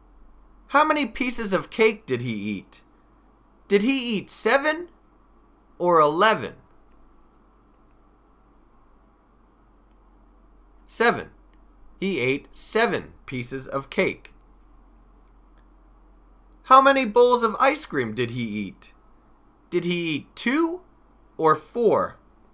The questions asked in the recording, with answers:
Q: How many pieces of cake did he eat?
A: 7. He ate 7 pieces of cake.